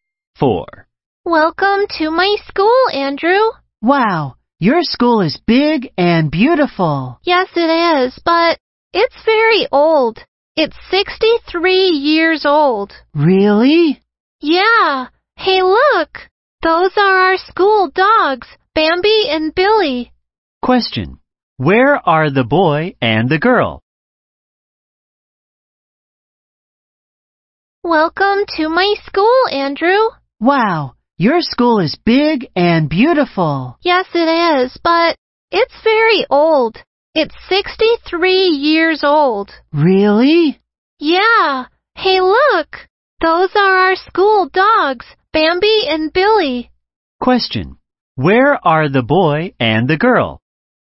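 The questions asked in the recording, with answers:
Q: Where are the boy and the girl?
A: At the girl's school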